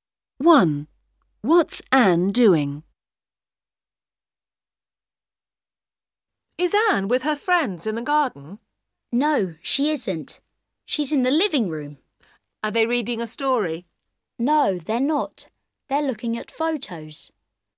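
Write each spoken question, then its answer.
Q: What's Anne doing?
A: Looking at photos with her friends in the living room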